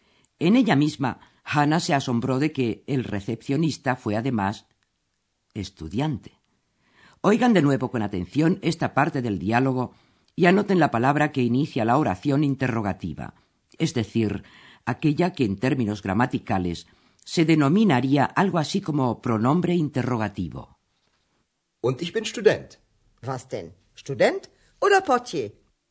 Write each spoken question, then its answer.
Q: anoten la palabra que inicia la oración interrogativa es decir, aquella que en términos gramaticales se denominaría algo así como pronombre interrogativo.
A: Y es la palabra vas. ¿Qué?